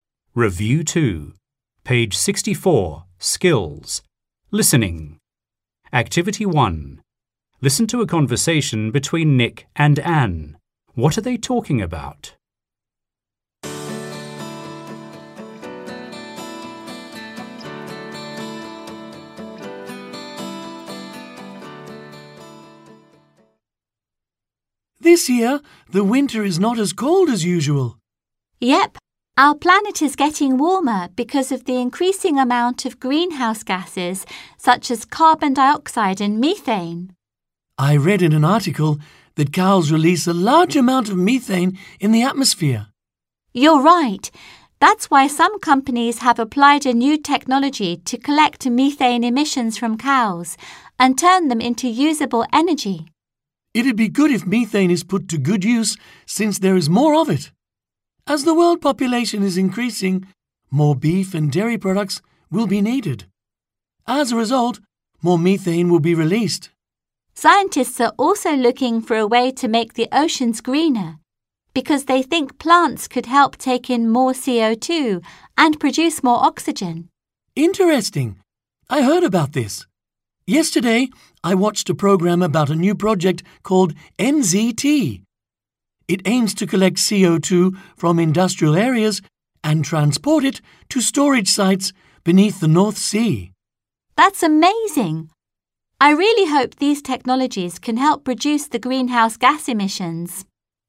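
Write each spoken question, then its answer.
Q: What are they talking about?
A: New technologies to reduce greenhouse gas emissions and global warming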